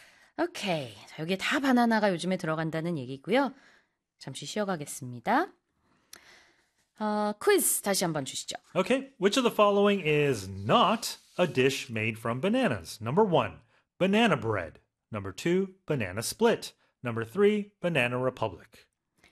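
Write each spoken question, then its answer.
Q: Okay, which of the following is not a dish made from bananas?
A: 3: banana republic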